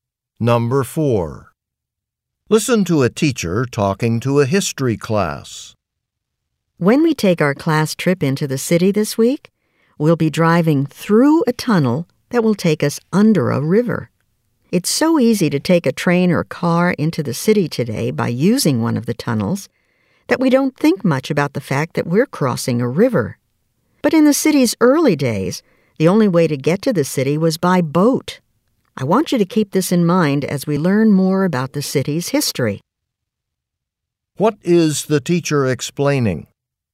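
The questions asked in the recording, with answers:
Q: What is the teacher explaining?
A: In early days the city could only be reached by boat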